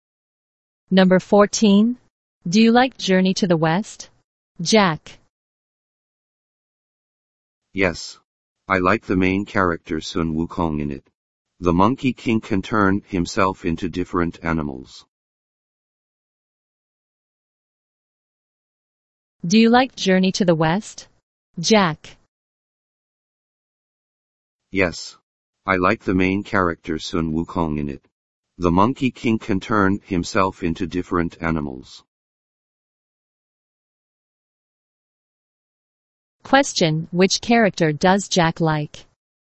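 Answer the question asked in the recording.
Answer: Sun Wukong (the Monkey King)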